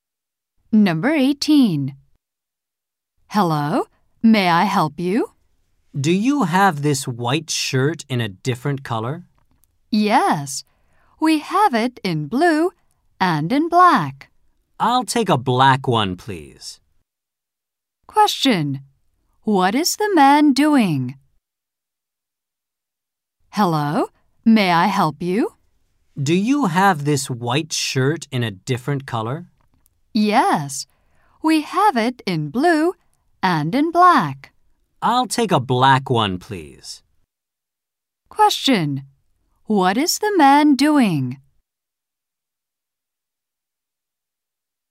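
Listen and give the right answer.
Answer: Buying a shirt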